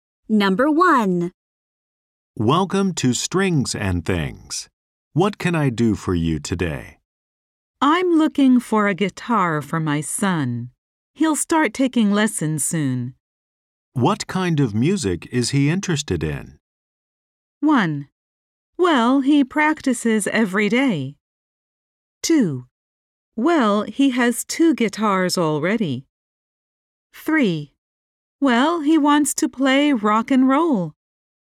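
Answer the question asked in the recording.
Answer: 3: Well, he wants to play rock and roll.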